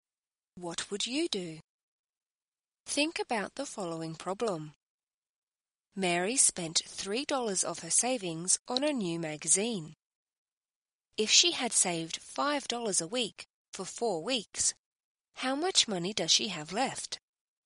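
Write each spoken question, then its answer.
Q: If she had saved $5 a week for 4 weeks, how much money does she have left?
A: $17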